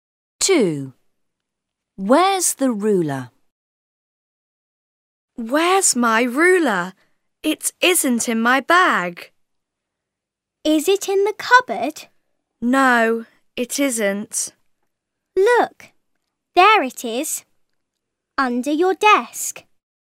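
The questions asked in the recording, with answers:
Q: Where's the ruler?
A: under the desk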